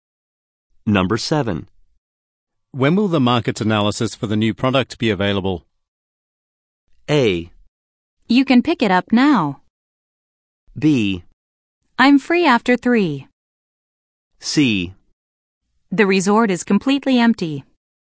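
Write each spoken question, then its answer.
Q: When will the market analysis for the new product be available?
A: A: You can pick it up now.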